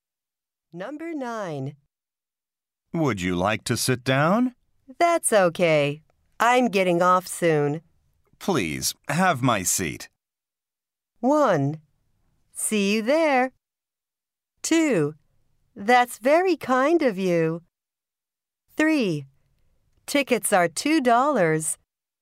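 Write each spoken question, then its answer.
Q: Please, have my seat.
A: 2: That's very kind of you.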